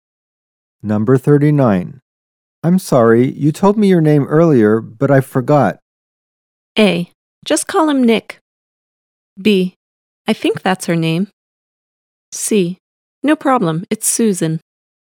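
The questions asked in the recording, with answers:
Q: I'm sorry, you told me your name earlier, but I forgot.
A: C: No problem, it's Susan.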